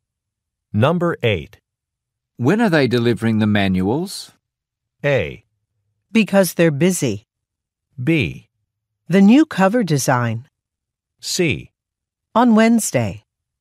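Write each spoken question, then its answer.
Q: When are they delivering the manuals?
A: C: On Wednesday.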